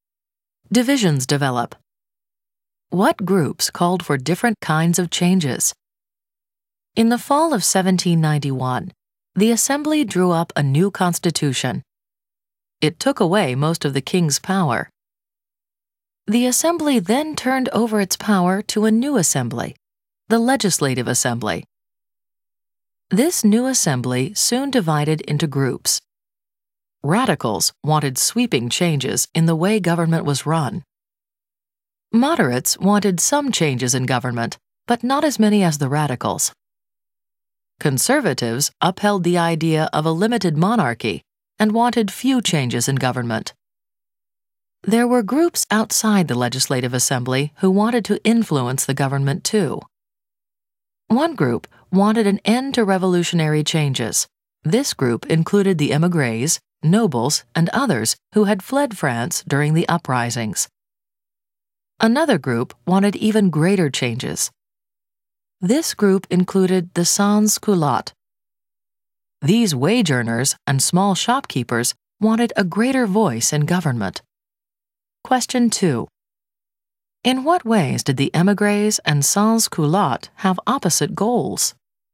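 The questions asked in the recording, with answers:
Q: In what ways did the émigrés and sans-culottes have opposite goals?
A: Émigrés wanted an end to revolutionary changes; sans-culottes wanted even greater changes and a greater voice in government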